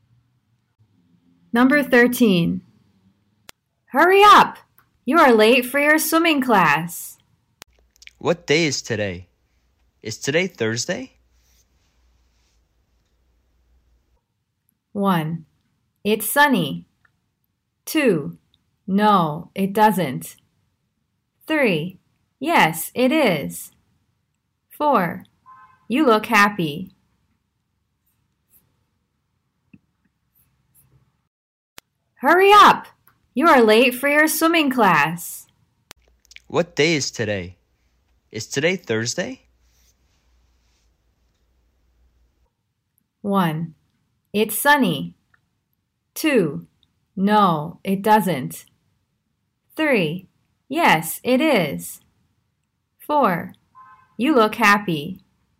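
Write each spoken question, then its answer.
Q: What day is today? Is today Thursday?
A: 3: Yes, it is.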